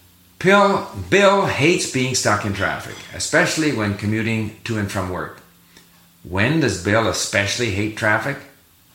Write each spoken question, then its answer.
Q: When does Bill especially hate traffic?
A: He especially hates traffic when commuting to and from work.